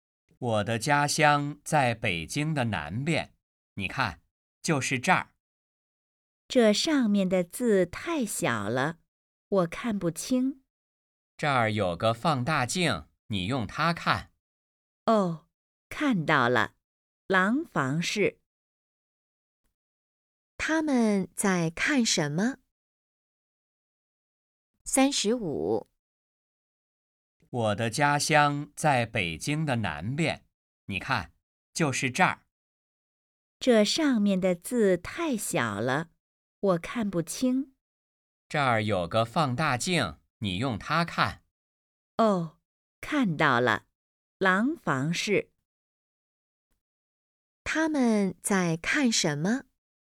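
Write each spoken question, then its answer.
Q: 他们在看什么?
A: 地图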